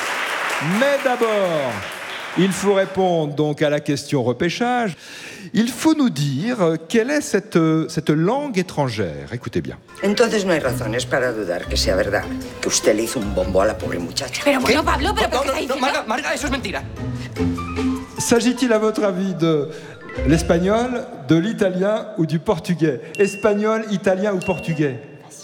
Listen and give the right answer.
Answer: Mais c'est de l'espagnol, vous avez reconnu tout de suite.